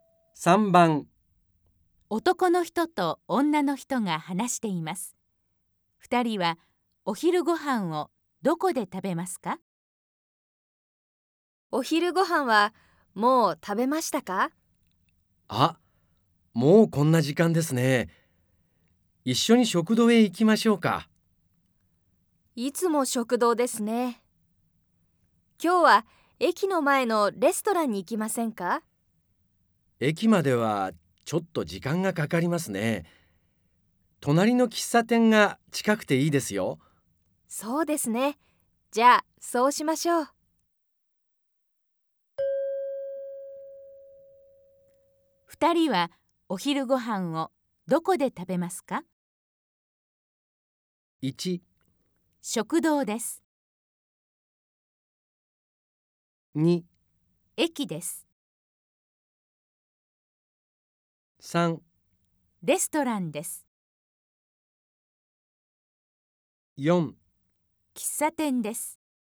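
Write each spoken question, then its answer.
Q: 二人はお昼ご飯をどこで食べますか?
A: 4: 喫茶店です。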